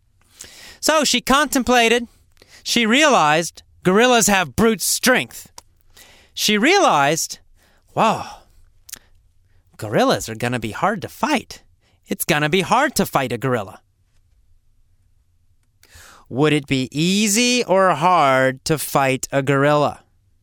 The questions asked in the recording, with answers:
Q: Would it be easy or hard to fight a gorilla?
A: It would be hard for Tomoe to fight a gorilla.